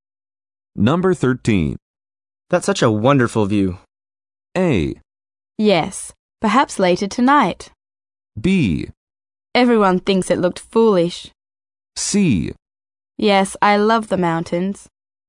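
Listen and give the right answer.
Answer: C: Yes, I love the mountains.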